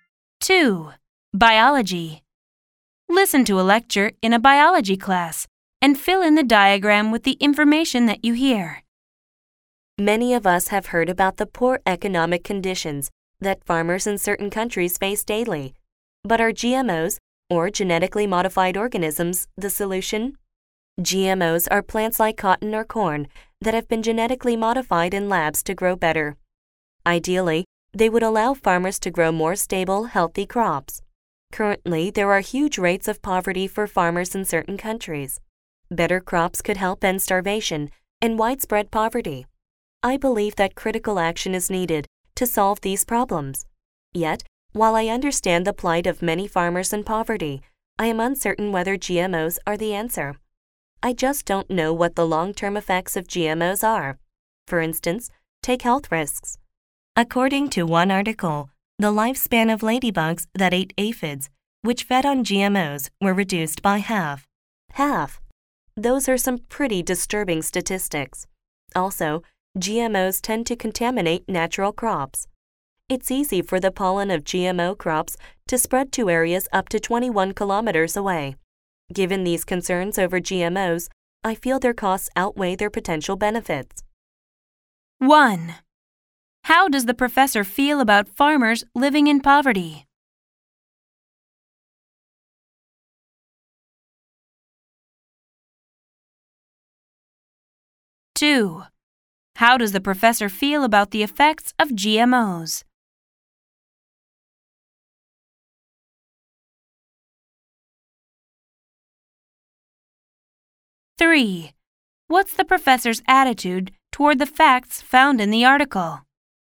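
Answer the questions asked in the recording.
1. Sympathetic; believes critical action is needed to solve their problems
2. Uncertain about their long-term effects; feels their costs outweigh their benefits
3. Finds them disturbing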